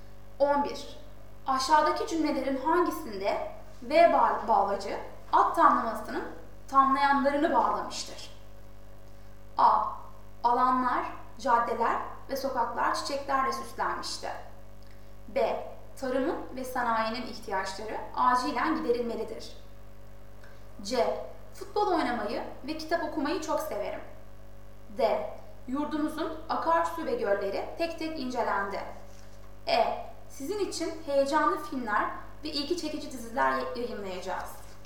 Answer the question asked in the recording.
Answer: Doğru yanıt B.